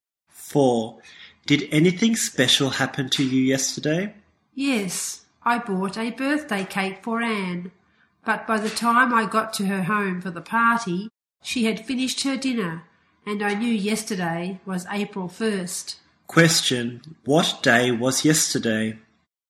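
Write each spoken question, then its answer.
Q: What day was yesterday?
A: April 1st (April Fool's Day).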